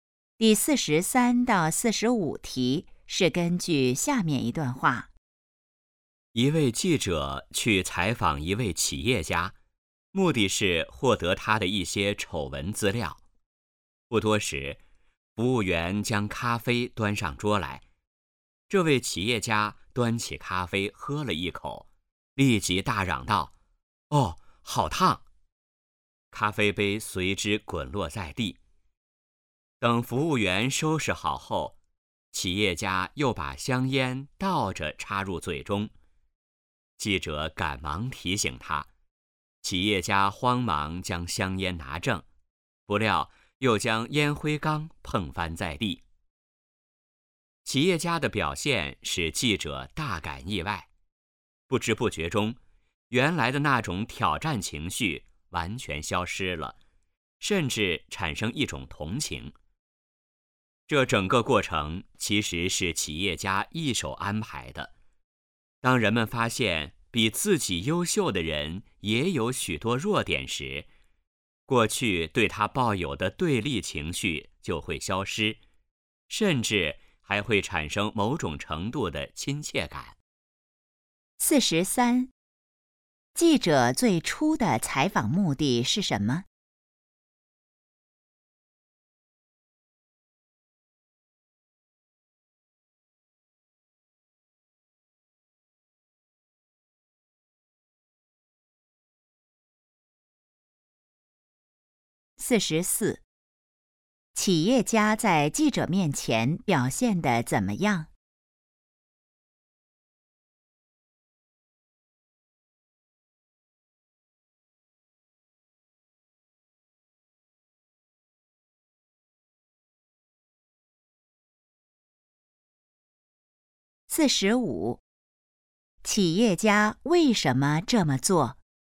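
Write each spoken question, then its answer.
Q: 记者最初的采访目的是什么?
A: 获得企业家的丑闻资料

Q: 企业家在记者面前表现得怎么样?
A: 很慌乱,不断出错

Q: 企业家为什么这么做?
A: 消除记者的对立情绪,让记者产生亲切感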